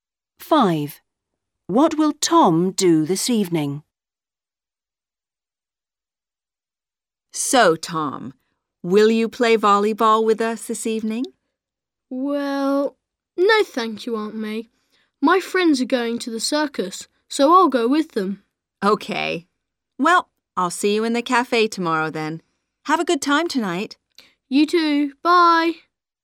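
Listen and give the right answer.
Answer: go to the circus with his friends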